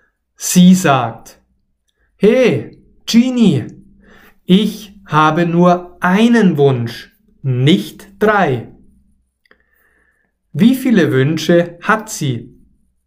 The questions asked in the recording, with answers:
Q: Wie viele Wünsche hat sie?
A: Einen. Sie, also Tamara, hat nur einen Wunsch.